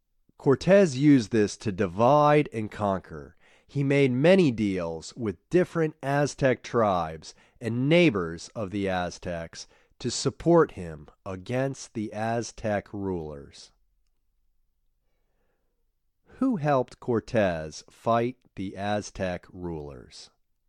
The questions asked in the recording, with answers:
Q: Who helped Cortés fight the Aztec rulers?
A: Some Aztec tribes and the neighbors of the Aztecs helped him fight the Aztec rulers.